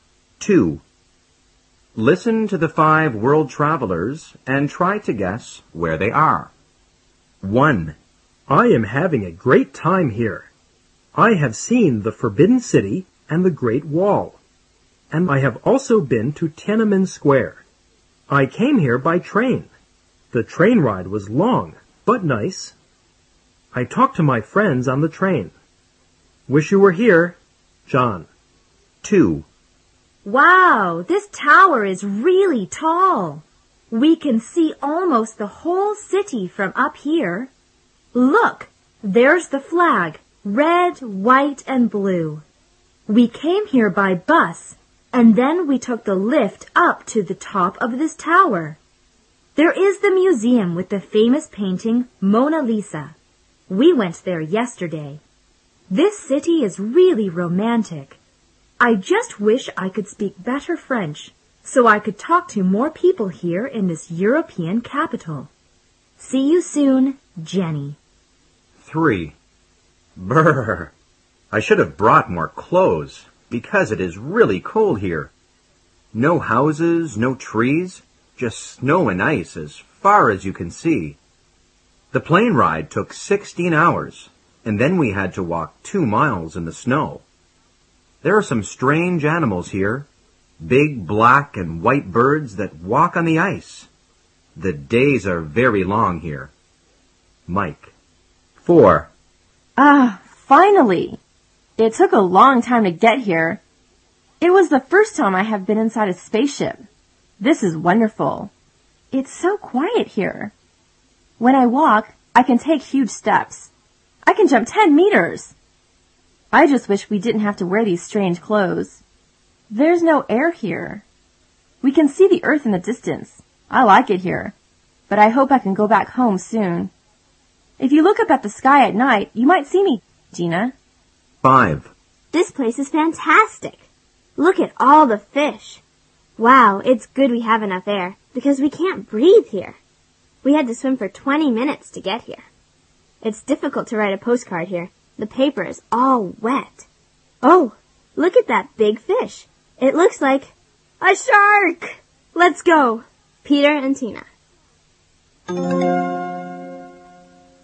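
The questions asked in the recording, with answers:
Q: Listen to the 5 world travelers and try to guess where they are.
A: Beijing, China

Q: Listen to the 5 world travelers and try to guess where they are.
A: Paris, France

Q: Listen to the 5 world travelers and try to guess where they are.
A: Antarctica

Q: Listen to the 5 world travelers and try to guess where they are.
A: Under the sea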